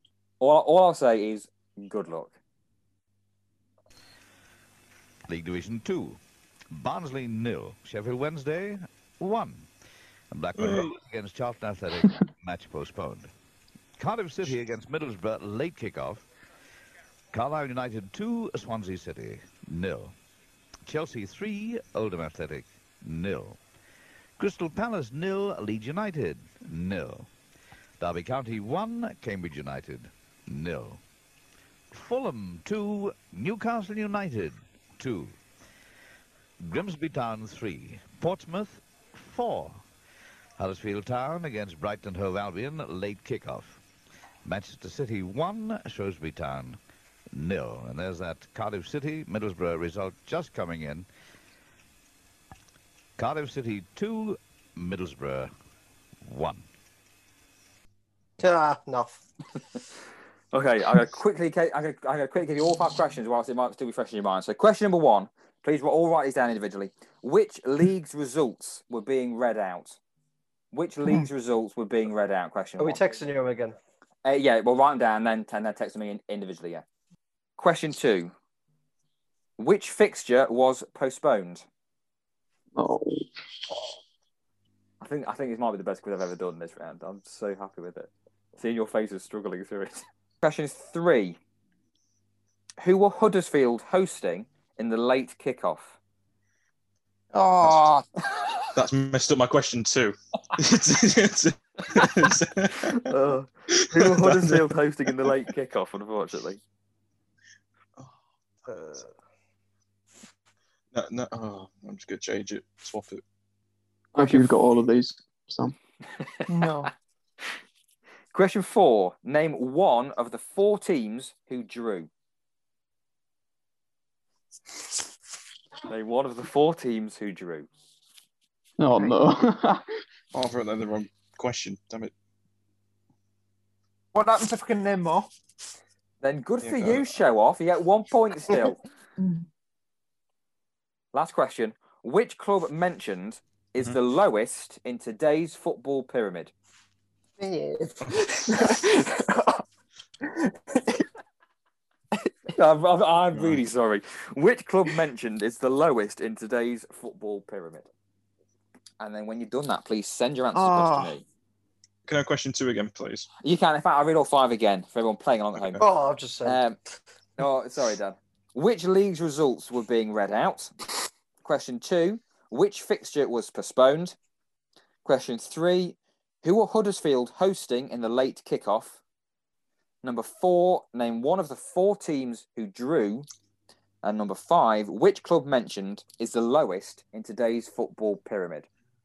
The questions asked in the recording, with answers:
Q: Which league's results were being read out?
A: The league Division Two.

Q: Which fixture was postponed?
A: the fixture that was postponed was Blackburn versus Charlton.

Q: Who were Huddersfield hosting in the late kickoff?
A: Huddersfield were hosting Brighton in the late kickoff.

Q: Name one of the four teams who drew.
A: The four teams who drew were Crystal Palace, Leeds, Fulham, and Newcastle.